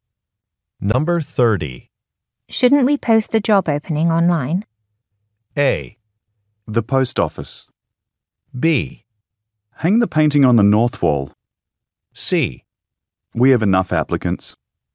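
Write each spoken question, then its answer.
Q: Shouldn't we post the job opening online?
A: C: We have enough applicants.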